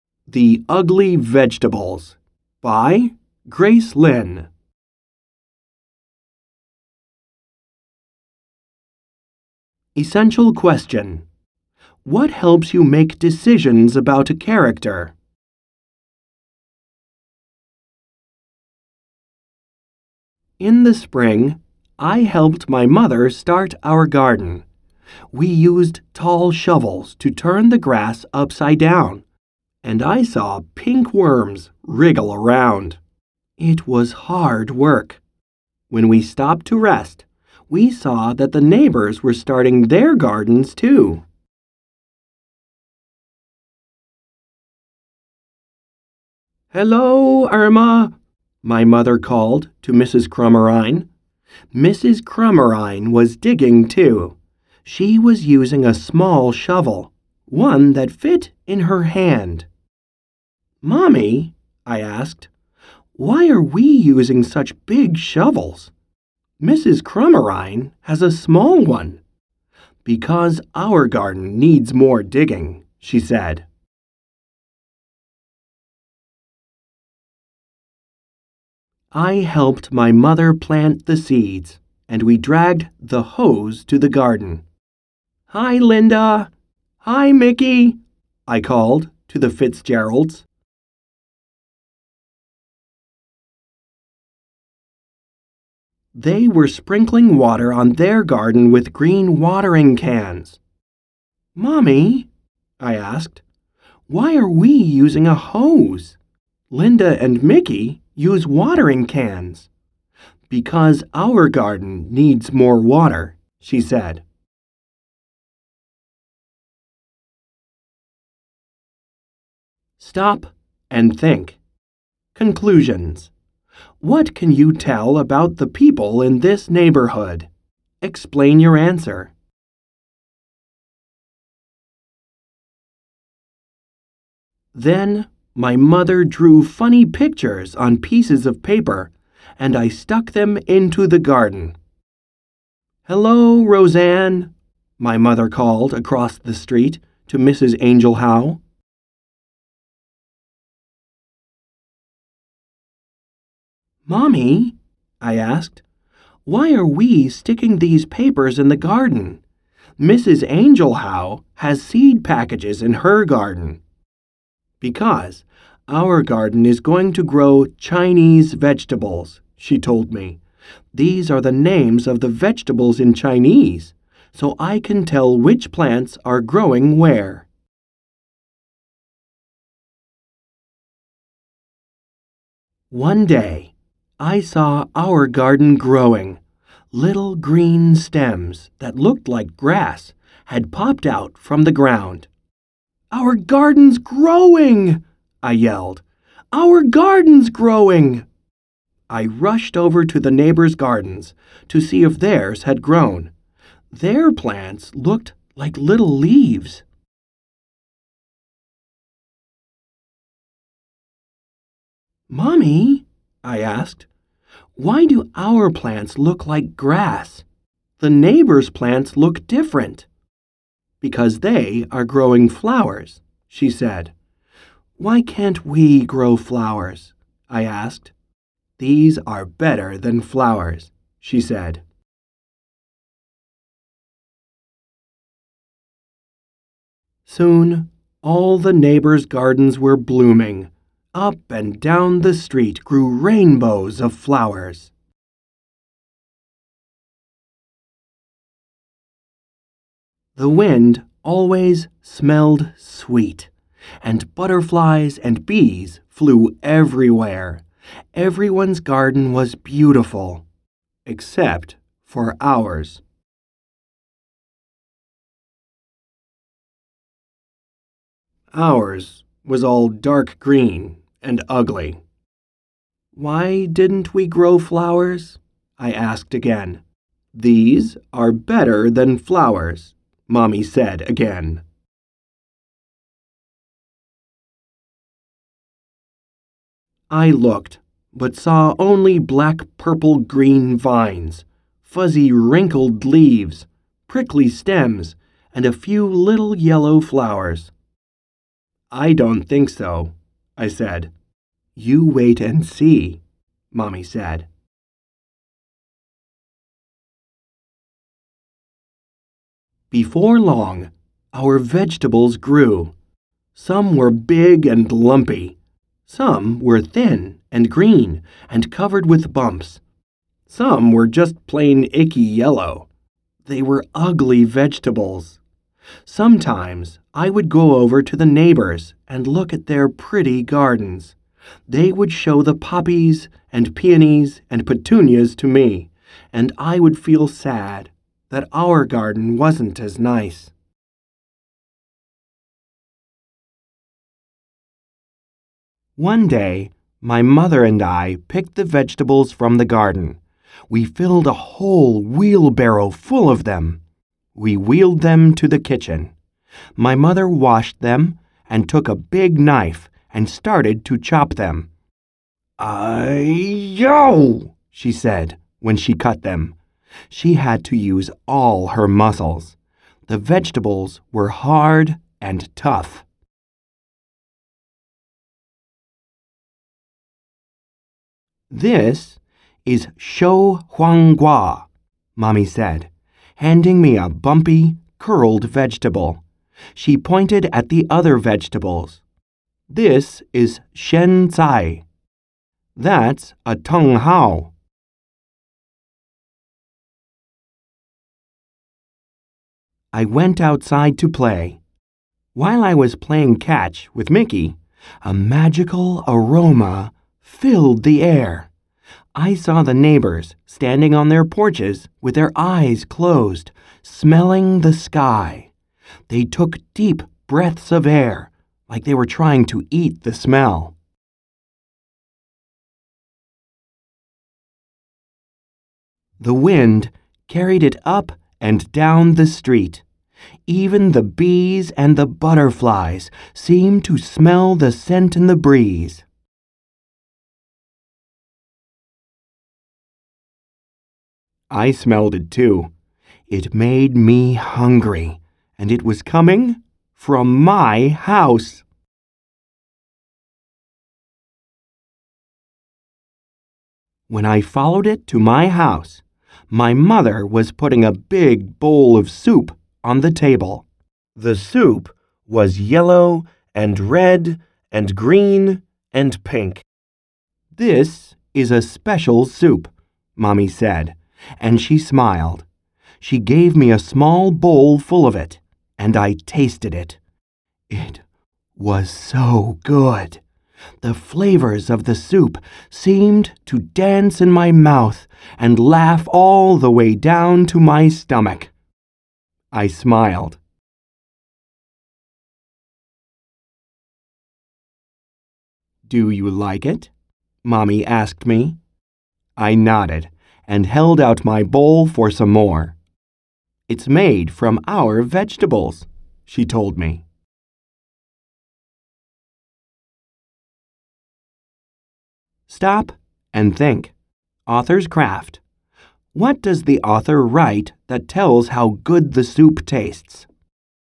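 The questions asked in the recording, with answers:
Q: What does the author write that tells how good the soup tastes?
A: The flavors of the soup seemed to dance in her mouth and laugh all the way down to her stomach.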